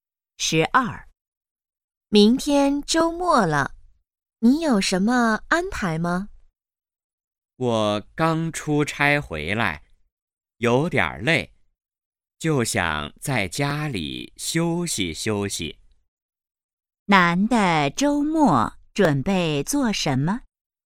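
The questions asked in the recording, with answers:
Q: 男的周末准备做什么?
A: 在家休息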